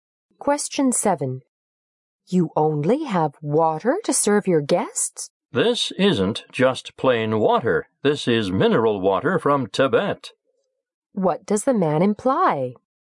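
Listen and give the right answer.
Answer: The water is special: mineral water from Tibet.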